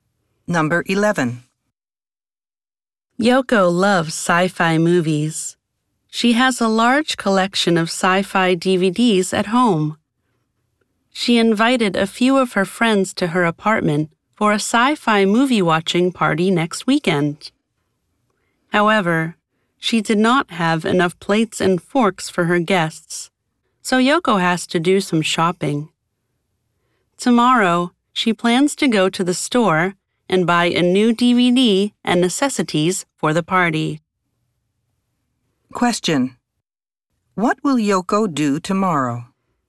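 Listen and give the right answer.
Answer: Go to the store to buy a new DVD and things for the party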